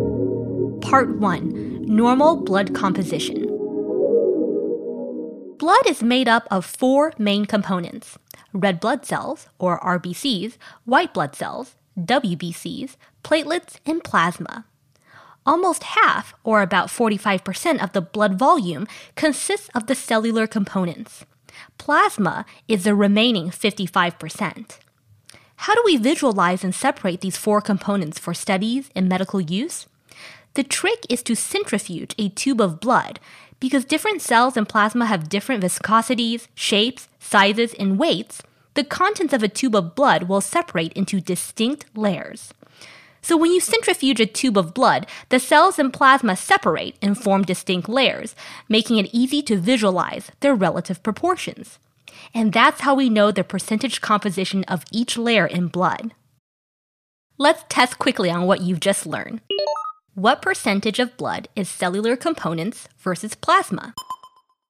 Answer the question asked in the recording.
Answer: The answer is that about 45% of blood volume is cells, and 55% is plasma.